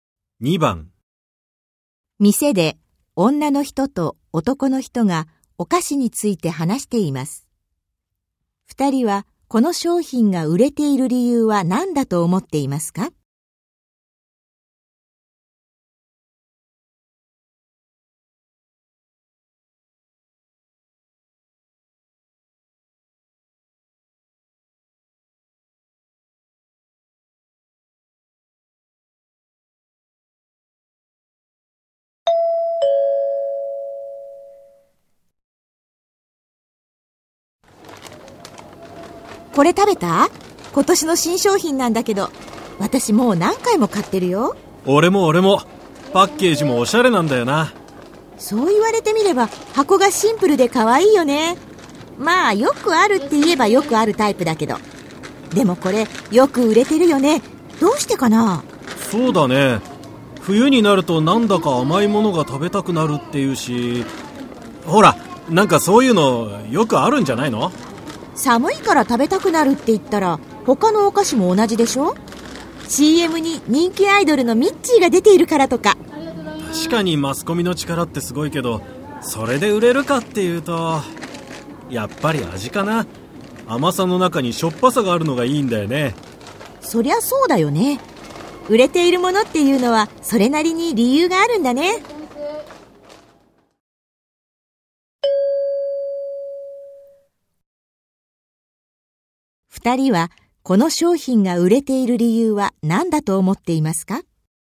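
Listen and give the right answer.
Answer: 味がいいから(甘さの中にしょっぱさがある)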